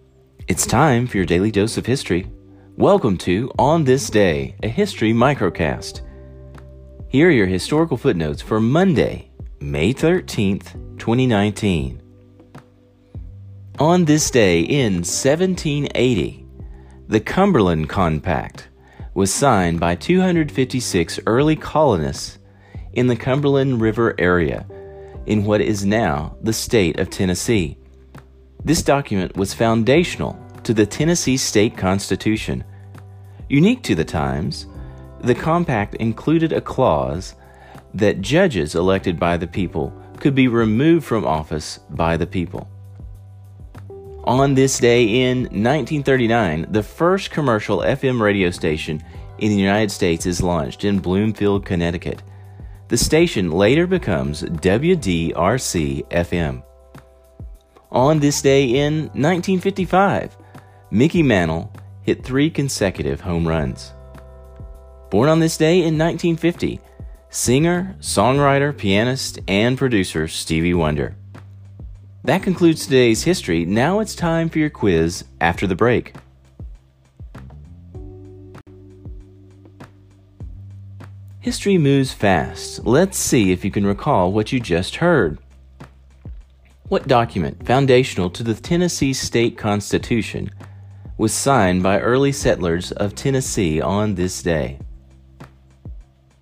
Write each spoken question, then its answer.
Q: What document, foundational to the Tennessee State Constitution, was signed by early settlers of Tennessee on this day?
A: the Cumberland Compact.